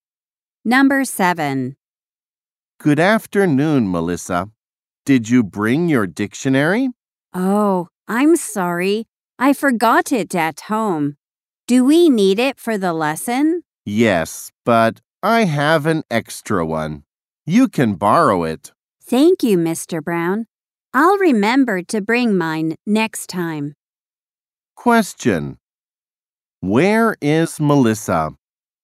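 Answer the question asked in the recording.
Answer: At school, in class.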